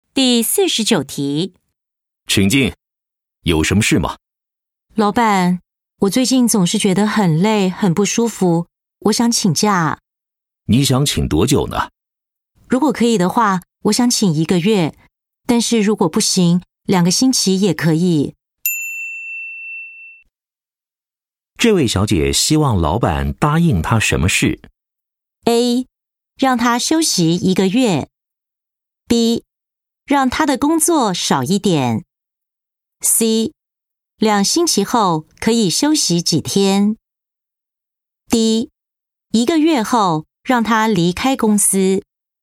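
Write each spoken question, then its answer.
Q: 这位小姐希望老板答应她什么事?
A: A: 让她休息一个月。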